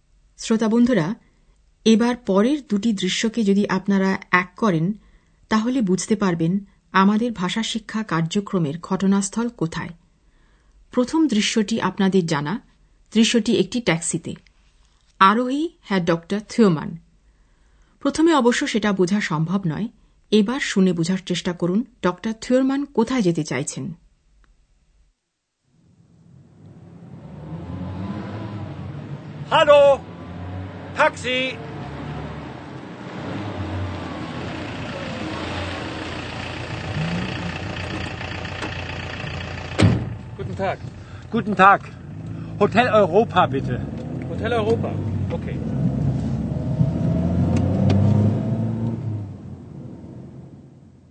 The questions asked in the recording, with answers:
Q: ডক্টর থিওরমান কোথায় যেতে চাইছেন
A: ডক্টর থিওমান চাইছেন যে taxi চালক তাকে hotel অরোপায় নিয়ে যাক